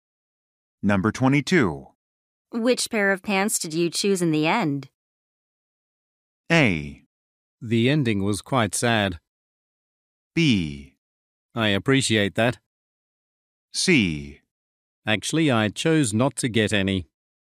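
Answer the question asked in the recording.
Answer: C: Actually, I chose not to get any.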